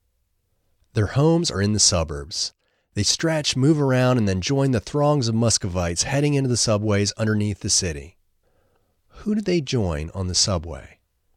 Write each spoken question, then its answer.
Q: Who do they join on the subway?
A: They join the throngs of Muscovites on the subway.